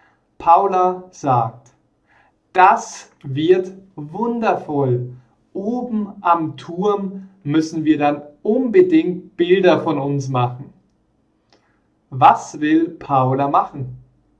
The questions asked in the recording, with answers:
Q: Was will Paula machen?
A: Bilder von ihnen. Sie will unbedingt Bilder von ihnen machen.